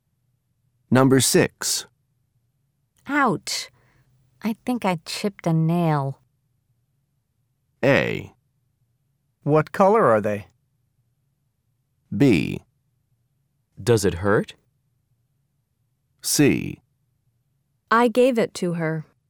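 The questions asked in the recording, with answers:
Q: Ouch. I think I chipped a nail.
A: B: Does it hurt?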